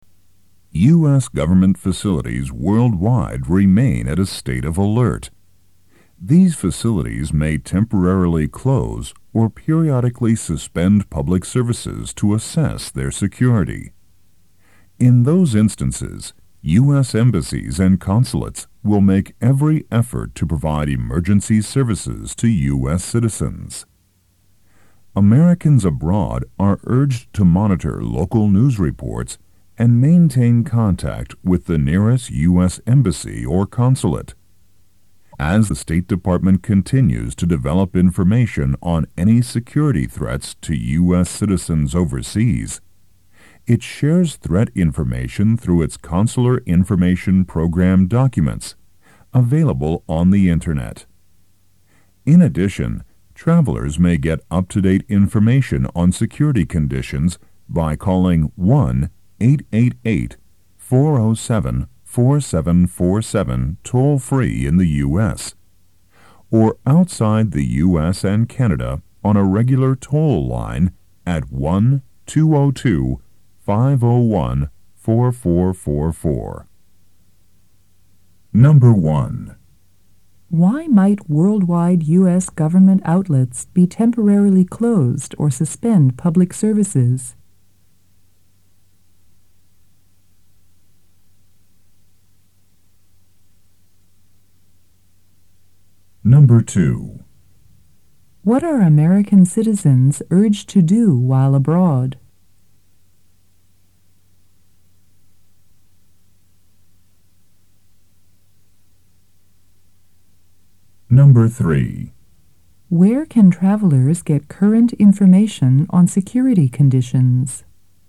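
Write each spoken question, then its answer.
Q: Why might worldwide U.S. government outlets be temporarily closed or suspend public services?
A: To assess their security

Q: What are American citizens urged to do while abroad?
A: Monitor local news reports and maintain contact with the nearest U.S. embassy or consulate

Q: Where can travelers get current information on security conditions?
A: By calling 1-888-407-4747 toll-free in the U.S., or 1-202-501-4444 from outside the U.S. and Canada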